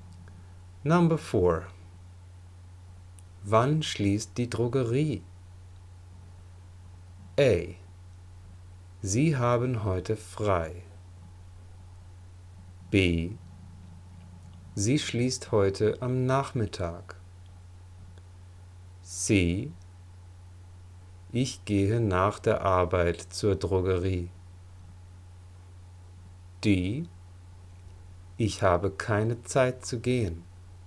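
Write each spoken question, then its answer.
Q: Wann schließt die Drogerie?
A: B: Sie schließt heute am Nachmittag.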